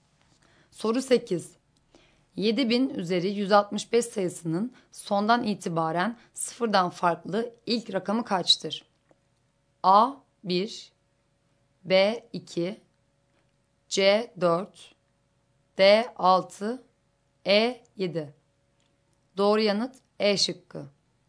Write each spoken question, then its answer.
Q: 7000 üzeri 165 sayısının sondan itibaren sıfırdan farklı ilk rakamı kaçtır?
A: Doğru yanıt E şıkkı.